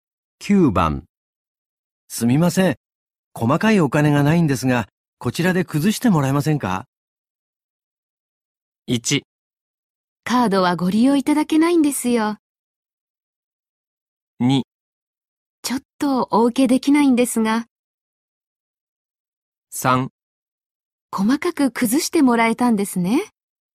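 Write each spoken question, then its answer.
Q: 9番。すみません。細かいお金がないんですが、こちらで崩してもらえませんか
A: 2: ちょっとお受けできないんですが。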